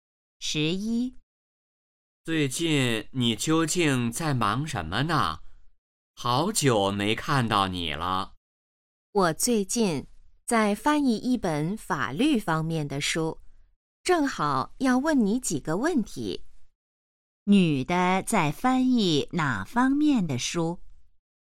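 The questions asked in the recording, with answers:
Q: 女的在翻译哪方面的书?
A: 法律方面的书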